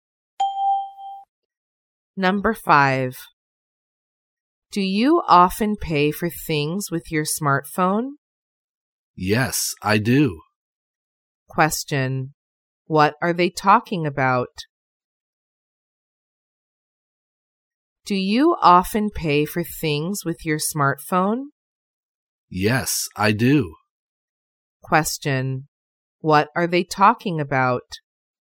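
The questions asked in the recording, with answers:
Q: Question: What are they talking about?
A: Paying for things with a smartphone.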